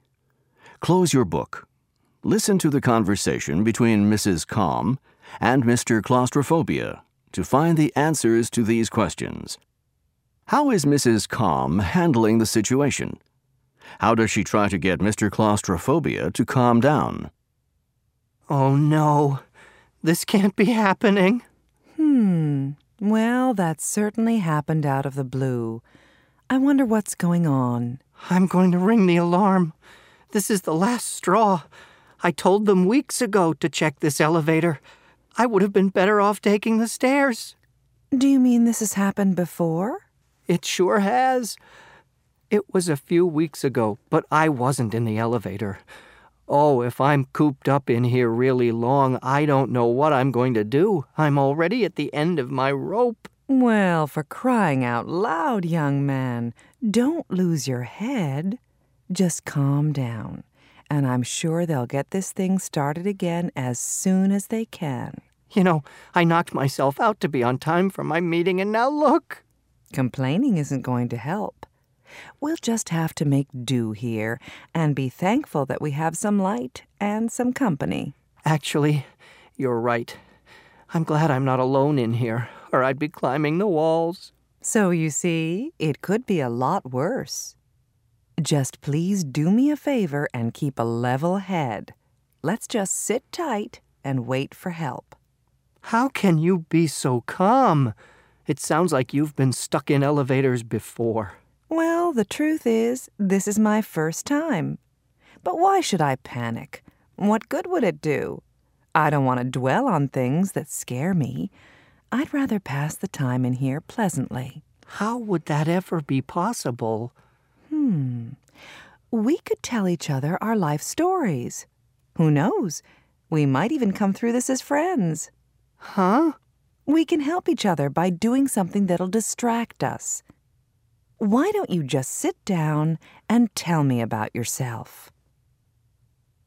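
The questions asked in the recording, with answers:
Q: How is Mrs. Calm handling the situation?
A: She stays calm and doesn't panic.

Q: How does she try to get Mr. Claustrophobia to calm down?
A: She tells him to keep a level head and suggests they tell each other their life stories to distract themselves.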